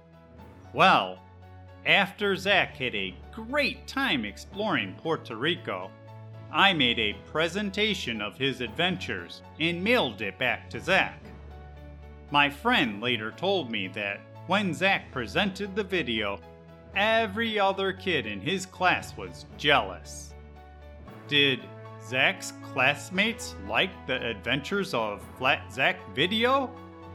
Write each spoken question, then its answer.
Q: Did Zack's classmates like the Adventures of Flat Zack video?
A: Yep, apparently, all of Zack's classmates were jealous because he had the very best adventures.